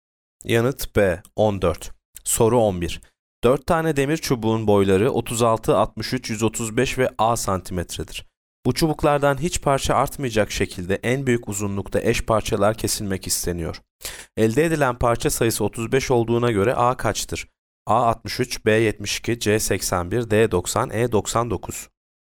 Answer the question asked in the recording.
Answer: Yanıt C 81.